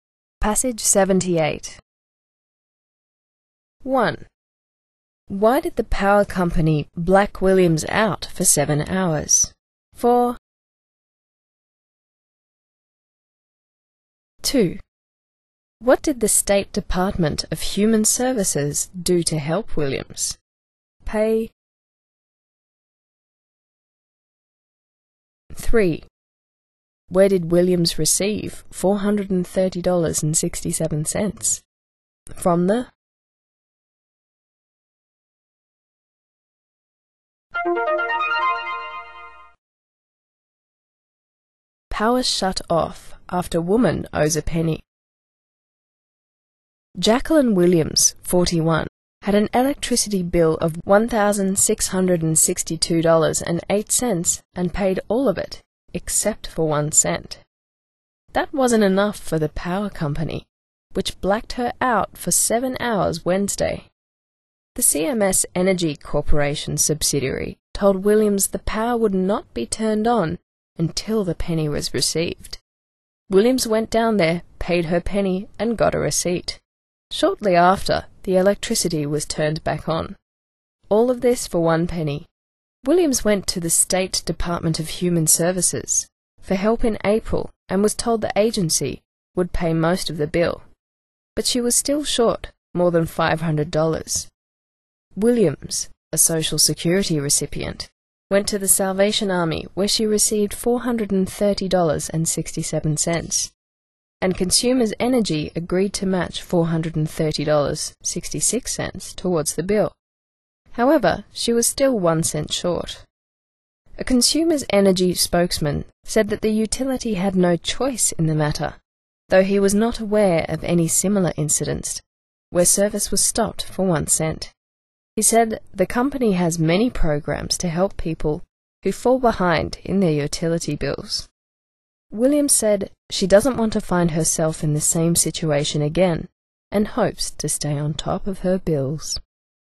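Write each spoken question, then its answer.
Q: Why did the power company black Williams out for 7 hours?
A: Because she still owed 1 cent (a penny) on her bill

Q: What did the State Department of Human Services do to help Williams?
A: It agreed to pay most of her bill

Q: Where did Williams receive $430.67?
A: From the Salvation Army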